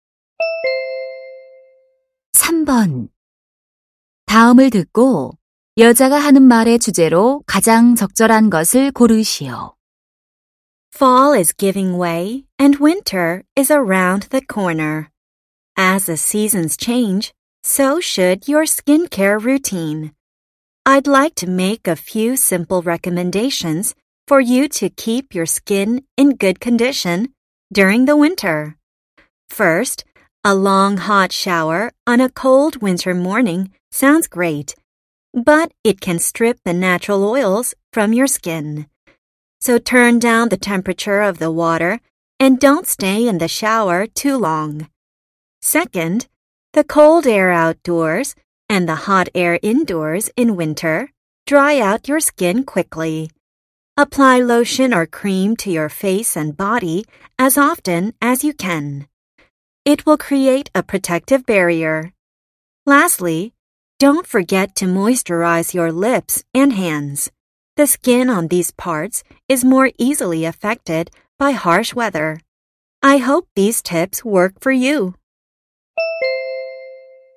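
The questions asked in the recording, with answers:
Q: 다음을 듣고 여자가 하는 말의 주제로 가장 적절한 것을 고르시오.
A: 겨울철 피부 관리 방법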